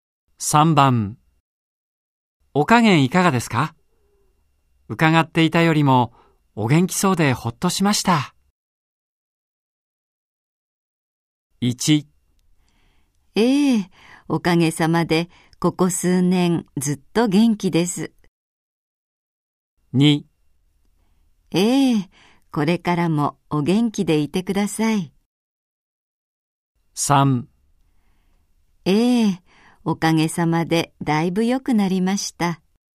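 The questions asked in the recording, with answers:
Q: お加減いかがですか?伺っていたよりもお元気そうでほっとしました。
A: 3: おかげさまでだいぶ良くなりました。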